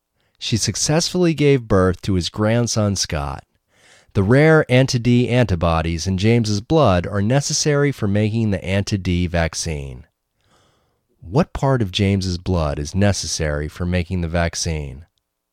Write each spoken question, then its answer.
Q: What part of James's blood is necessary for making the vaccine?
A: The rare anti-D antibodies in James's blood are necessary for making the vaccine.